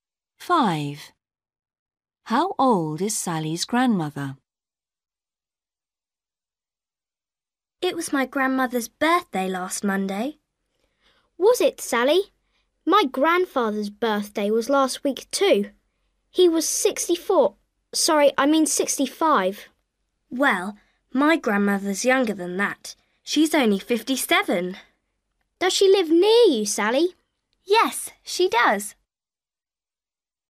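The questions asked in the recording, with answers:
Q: How old is Sally's grandmother?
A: 57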